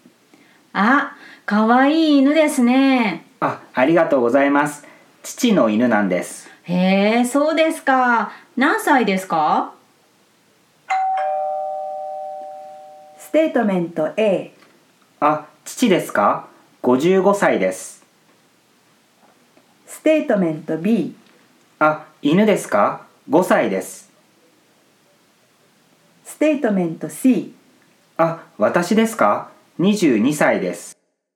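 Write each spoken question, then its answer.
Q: へえ、そうですか。何歳ですか?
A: B: あ、犬ですか?5歳です。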